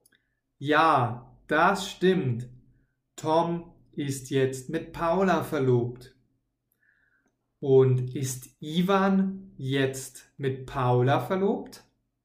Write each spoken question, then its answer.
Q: Und ist Ivan jetzt mit Paula verlobt?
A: Nein, Paula ist ja schon mit Tom verlobt.